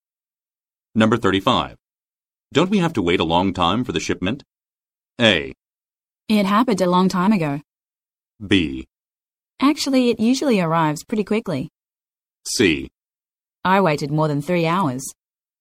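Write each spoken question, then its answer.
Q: Don't we have to wait a long time for the shipment?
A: B: Actually, it usually arrives pretty quickly.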